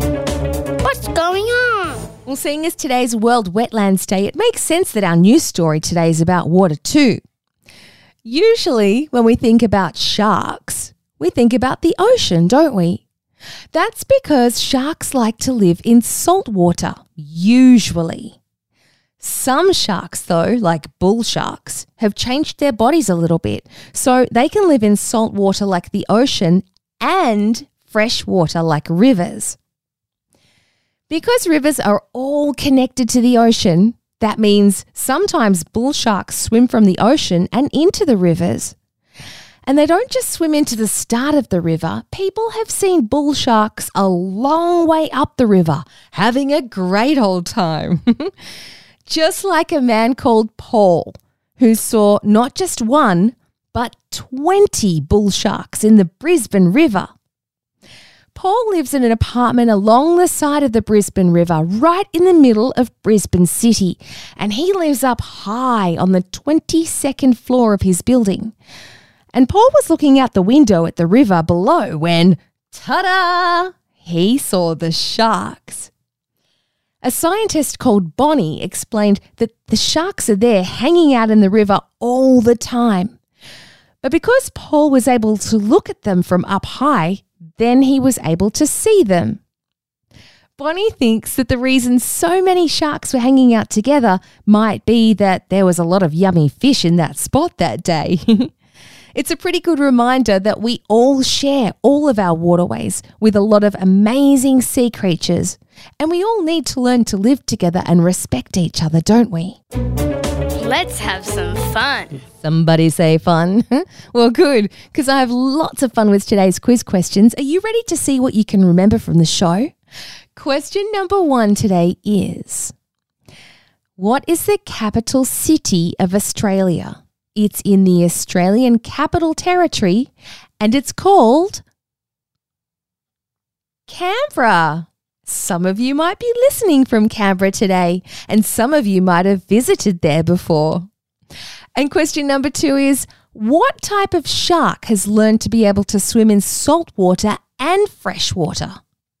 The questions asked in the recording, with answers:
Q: what type of shark has learned to be able to swim in salt water and fresh water?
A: For those that answered bull sharks, that's the answer we're looking for.